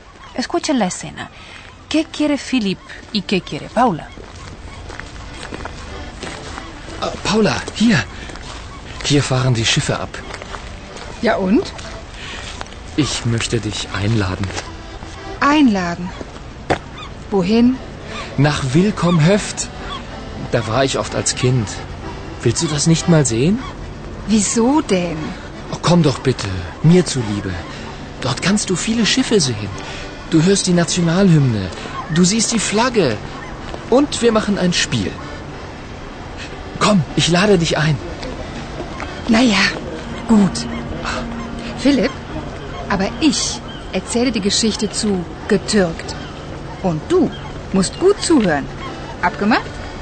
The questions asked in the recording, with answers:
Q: ¿Qué quiere Philip y qué quiere Paula?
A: Philip quiere mostrarle a Paula un lugar en donde estuvo muchas veces de niño.